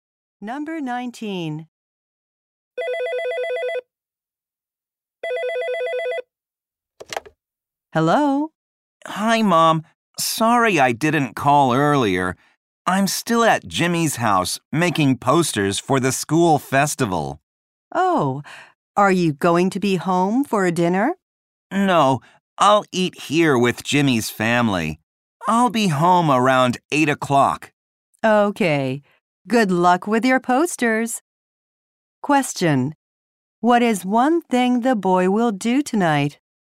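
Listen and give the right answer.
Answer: Eat dinner with Jimmy's family.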